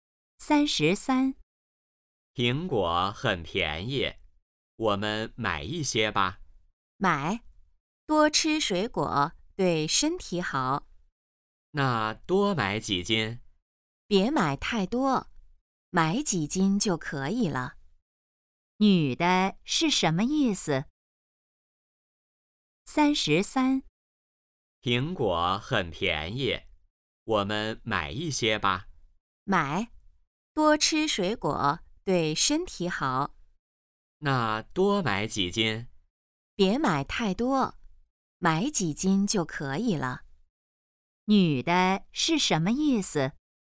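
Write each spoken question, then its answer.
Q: 女的是什么意思?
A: 别买太多,买几斤就可以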